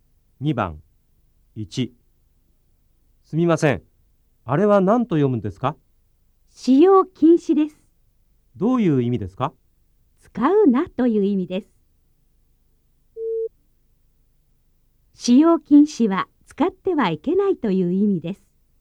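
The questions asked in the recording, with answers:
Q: 使用禁止は使ってはいけないという意味です。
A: ○(正しい)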